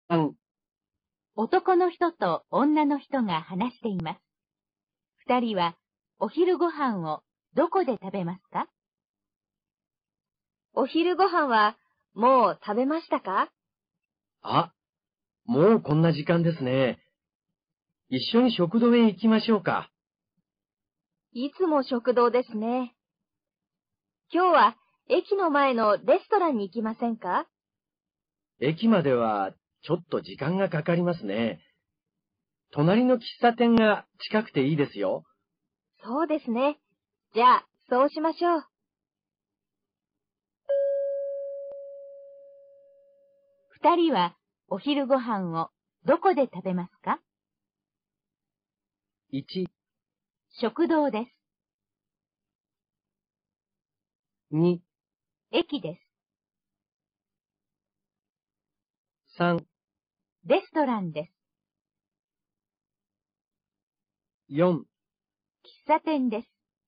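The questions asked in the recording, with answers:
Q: 二人はお昼ご飯をどこで食べますか?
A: 4: 喫茶店です。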